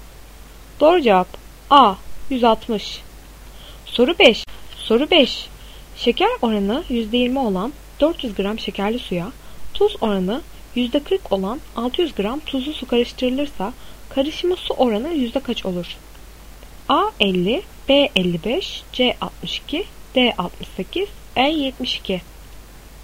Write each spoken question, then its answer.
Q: Şeker oranı %20 olan 400 gram şekerli suya tuz oranı %40 olan 600 gram tuzlu su karıştırılırsa karışımı su oranı yüzde kaç olur?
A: Doğru cevap D 68.